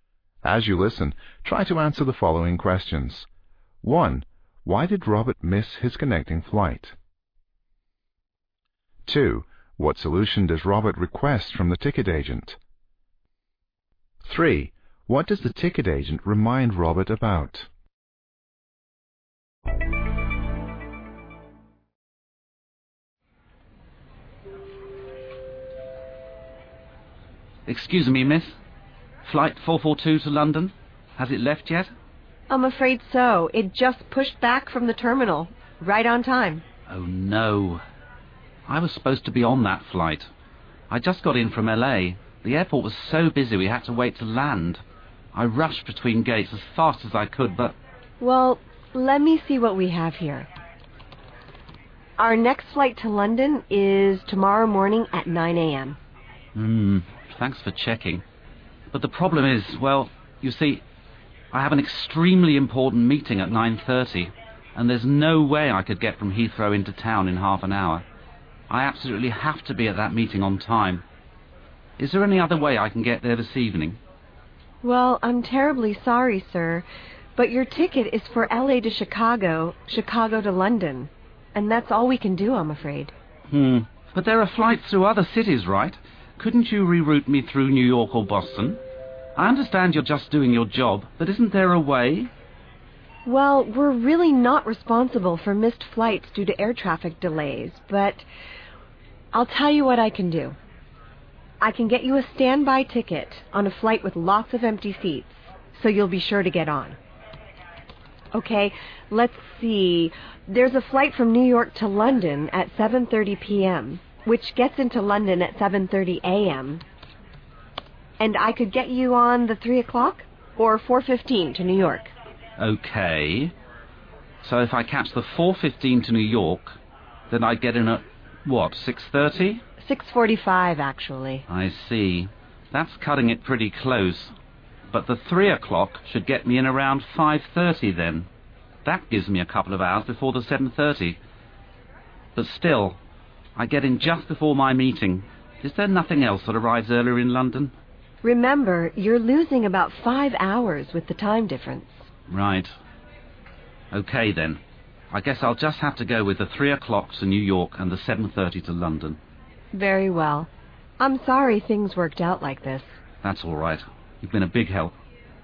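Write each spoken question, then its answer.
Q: Why did Robert miss his connecting flight?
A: His flight from LA was delayed landing because the Chicago airport was busy

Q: What solution does Robert request from the ticket agent?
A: To be rerouted through another city, such as New York or Boston

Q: What does the ticket agent remind Robert about?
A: That he loses about 5 hours with the time difference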